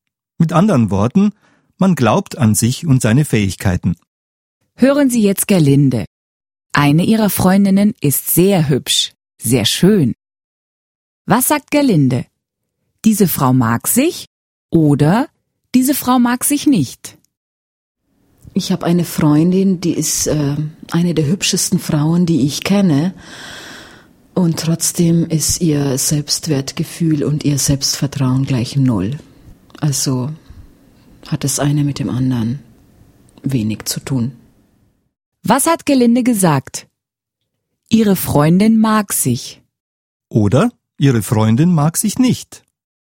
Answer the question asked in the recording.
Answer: Sie mag sich nicht.